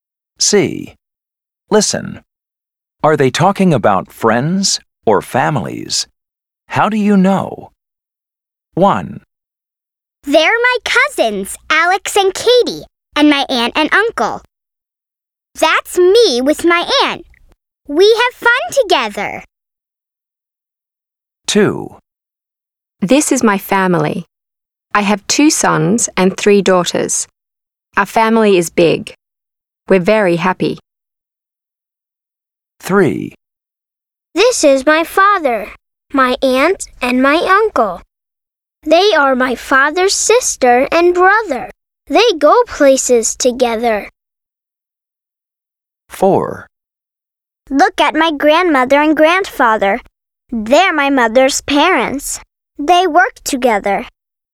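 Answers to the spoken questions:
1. families
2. families
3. families
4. families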